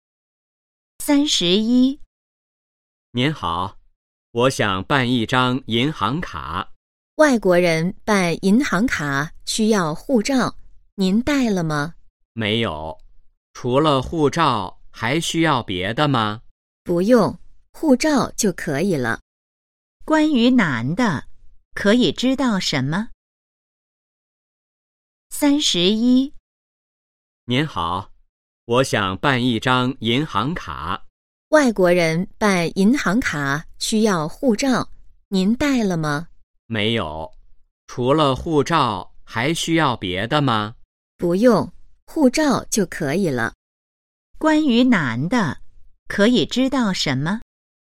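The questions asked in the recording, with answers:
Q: 关于男的,可以知道什么?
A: 他没带护照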